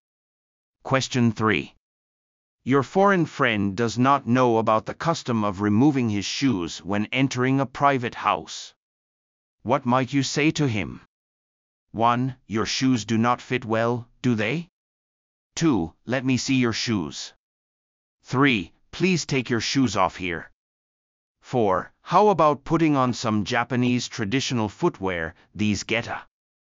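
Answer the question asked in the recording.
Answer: 3: Please take your shoes off here.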